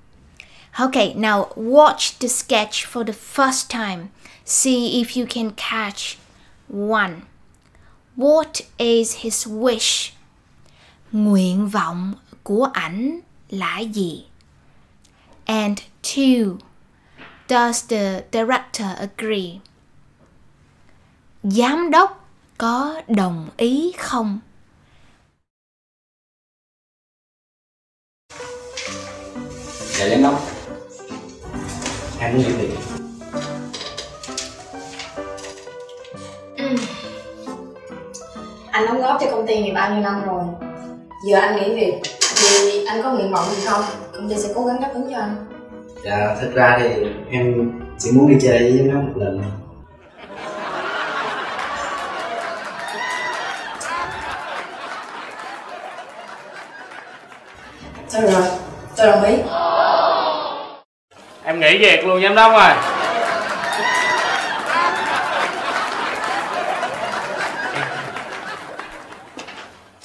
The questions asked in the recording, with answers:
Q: Does the director agree? Giám đốc có đồng ý không?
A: She nods her head, which means she agrees.